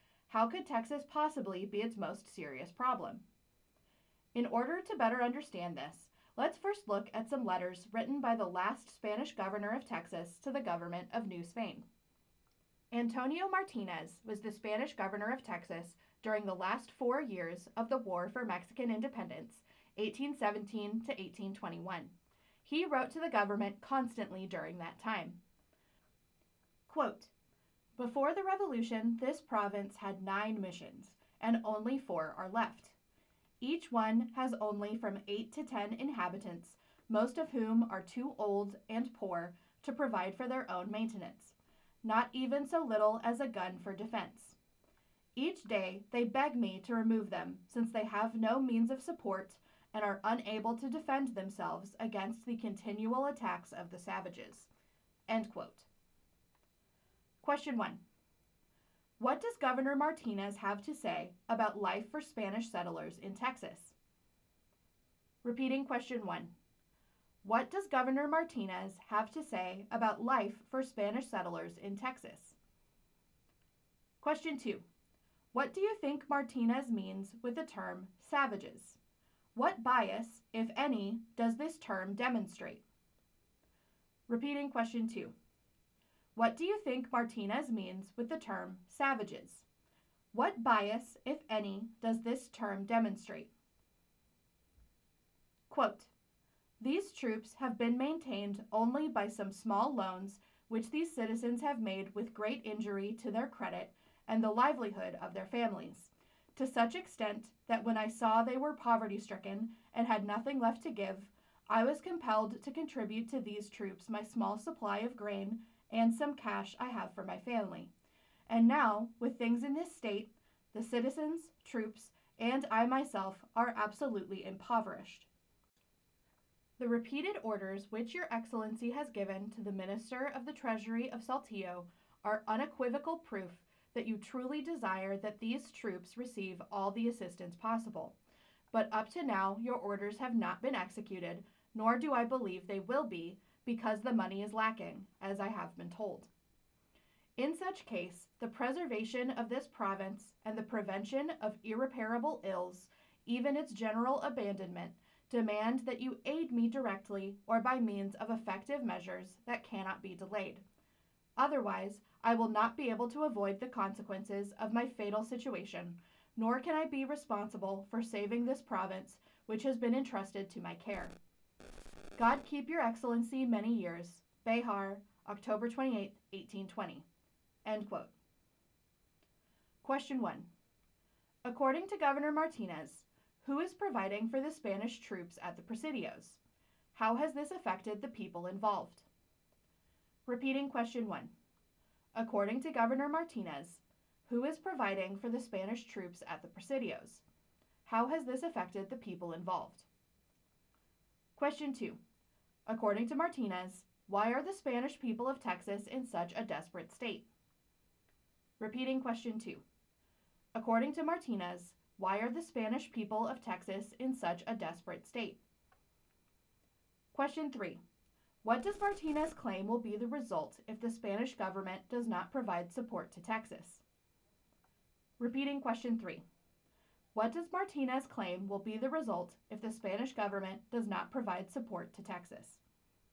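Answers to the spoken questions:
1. The local citizens (through small loans) and Martinez himself; they are all impoverished
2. The government's support never arrived because money is lacking
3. The province may be generally abandoned and lost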